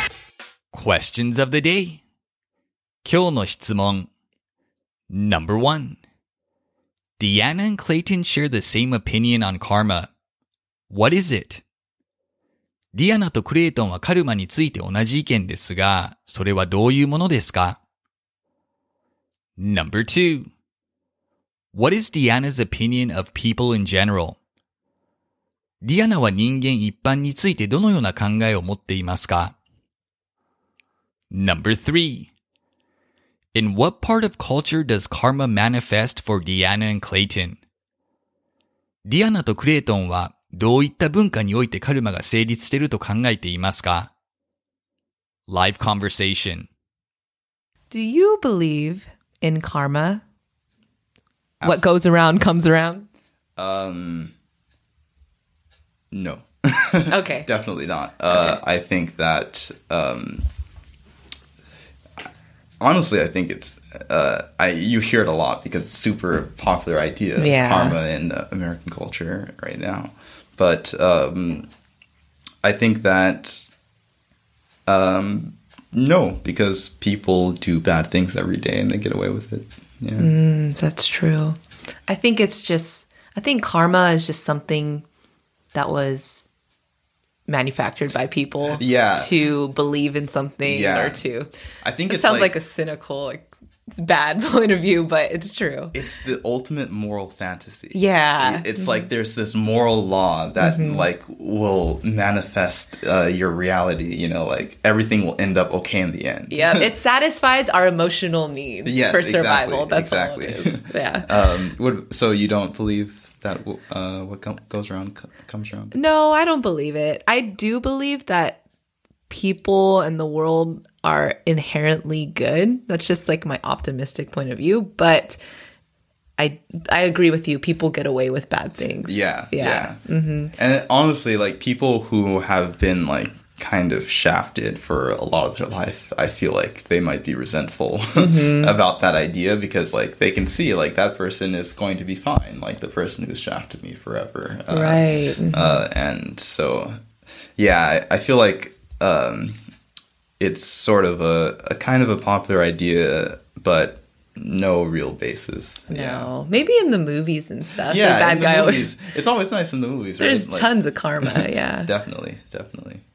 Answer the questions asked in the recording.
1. Neither of them believes that it's real, and think of it merely as a moral fantasy.
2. She believes that people in general are inherently good.
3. They both believe karma is a popular idea present in many movies.